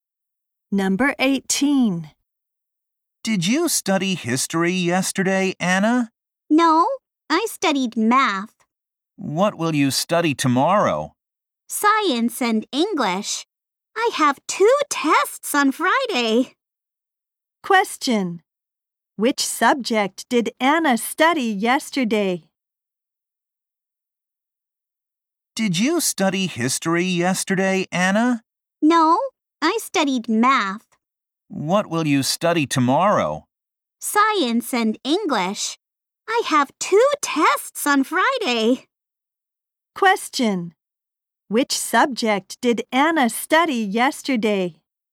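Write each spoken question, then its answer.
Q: Which subject did Anna study yesterday?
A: Math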